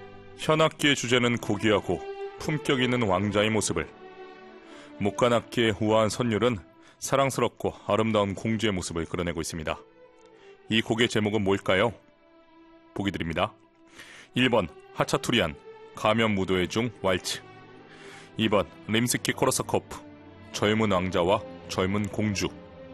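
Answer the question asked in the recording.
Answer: 2: 림스키코르사코프, 젊은 왕자와 젊은 공주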